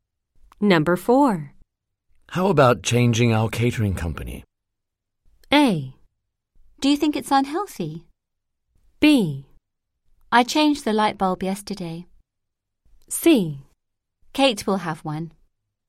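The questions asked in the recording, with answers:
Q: How about changing our catering company?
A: A: Do you think it's unhealthy?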